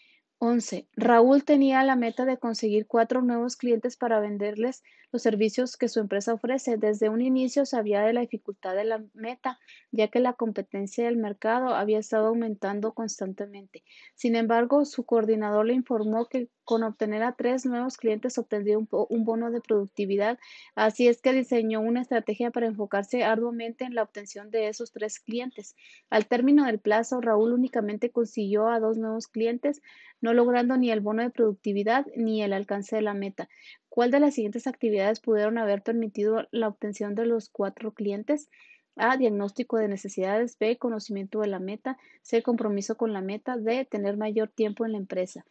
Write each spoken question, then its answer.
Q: ¿Cuál de las siguientes actividades pudieron haber permitido la obtención de los cuatro clientes?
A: Y la respuesta correcta es la C, compromiso con la meta.